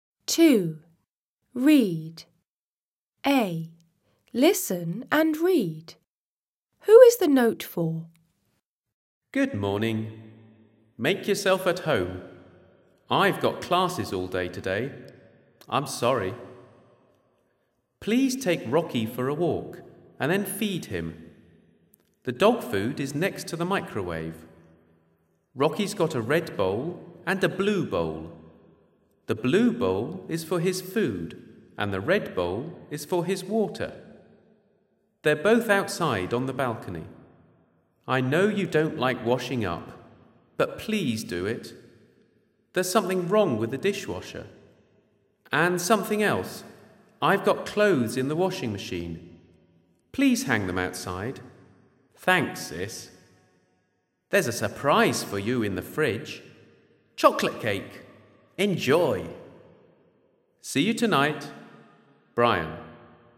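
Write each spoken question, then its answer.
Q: Who is the note for?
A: Brian's sister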